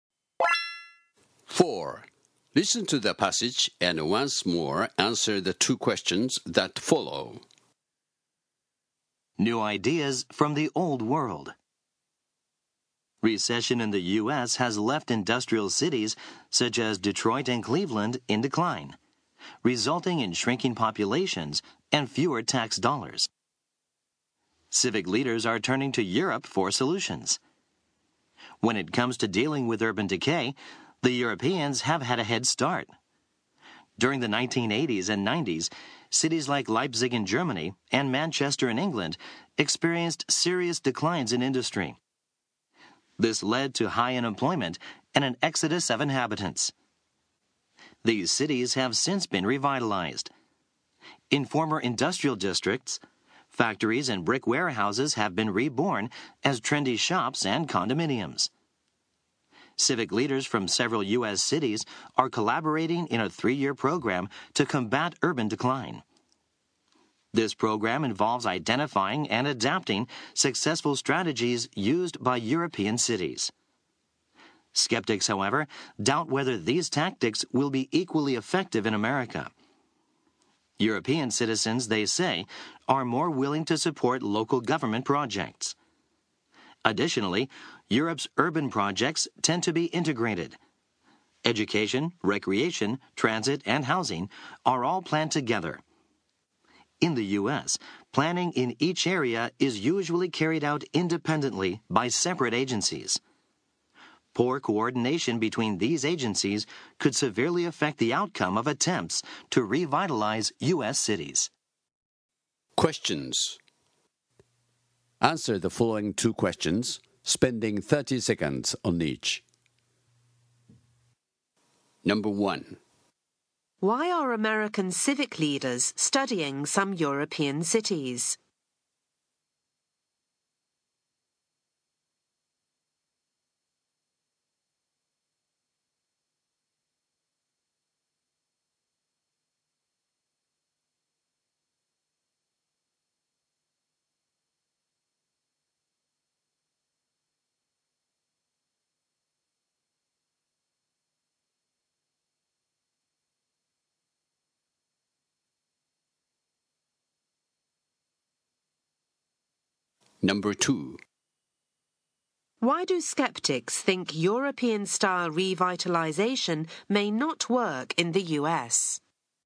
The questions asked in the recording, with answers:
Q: Why are American civic leaders studying some European cities?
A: because they want to adapt successful strategies used by European cities for revitalization projects in their cities.

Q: Why do skeptics think European style revitalization may not work in the US?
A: There are two reasons. First, people in Europe are more willing to support local government projects than people in the US.